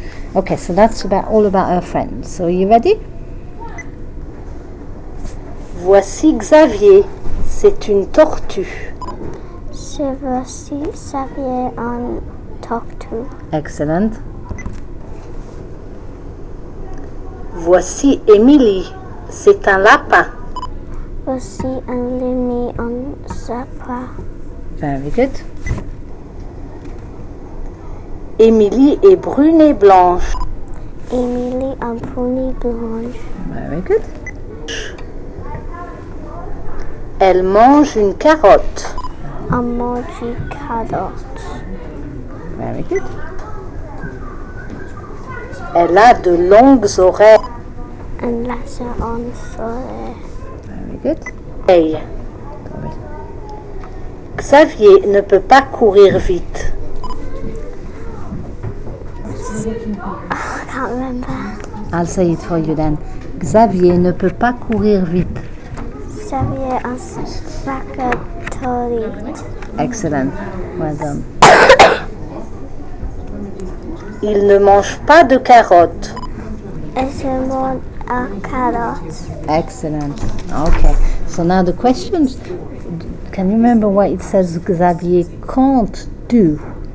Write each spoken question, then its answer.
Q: Can you remember what it says Xavier can't do?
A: It means he can't run fast.